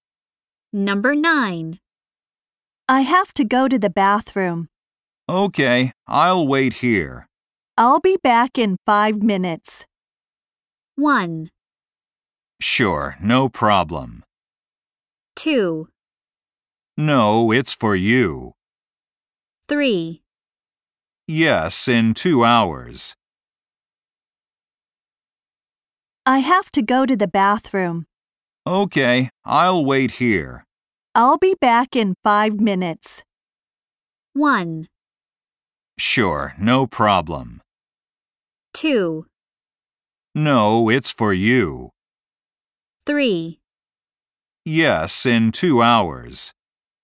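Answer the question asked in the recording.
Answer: 1: Sure, no problem.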